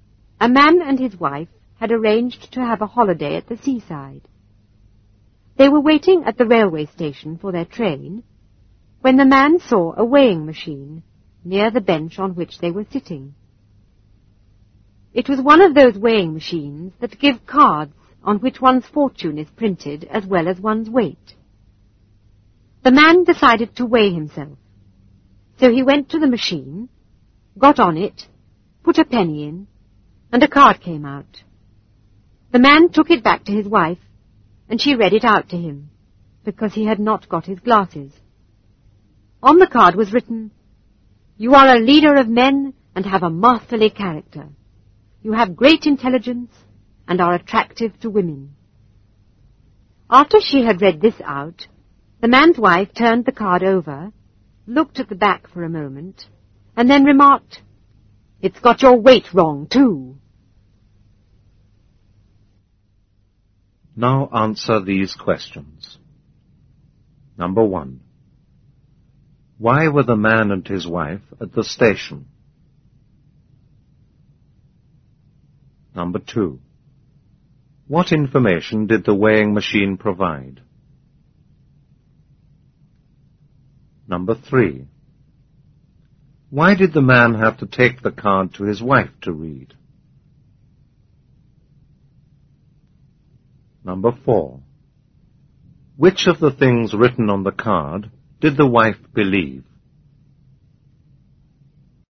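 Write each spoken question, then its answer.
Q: Why were the man and his wife at the station?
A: They were waiting for their train to go on holiday at the seaside.

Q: What information did the weighing machine provide?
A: One's weight and one's fortune.

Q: Why did the man have to take the card to his wife to read?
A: Because he had not got his glasses.

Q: Which of the things written on the card did the wife believe?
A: None of them.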